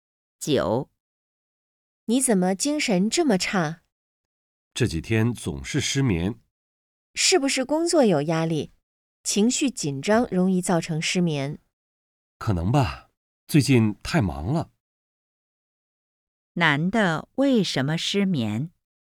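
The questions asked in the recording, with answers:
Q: 男的为什么失眠?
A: 最近工作太忙,有压力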